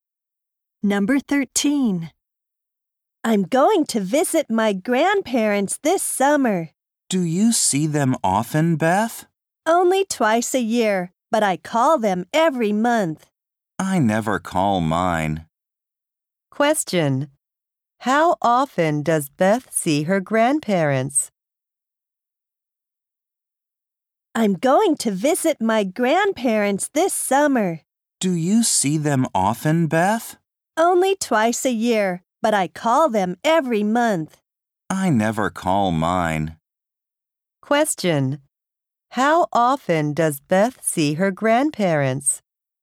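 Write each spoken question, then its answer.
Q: How often does Beth see her grandparents?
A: Twice a year.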